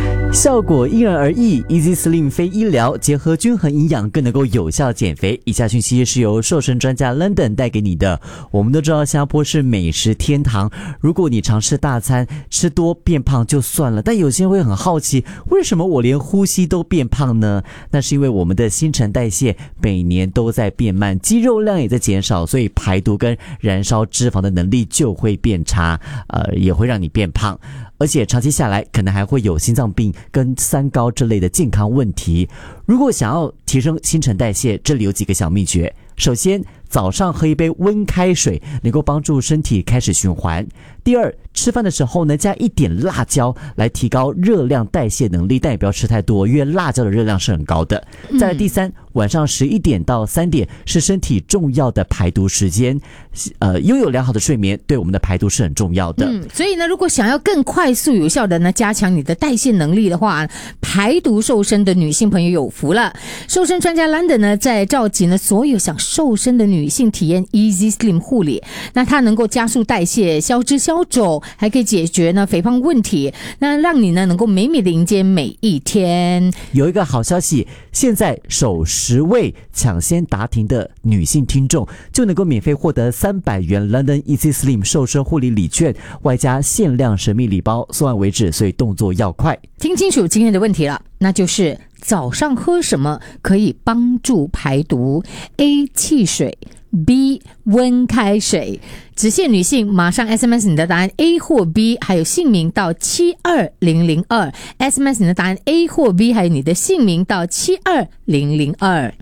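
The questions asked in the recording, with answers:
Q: 早上喝什么可以帮助排毒?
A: B: 温开水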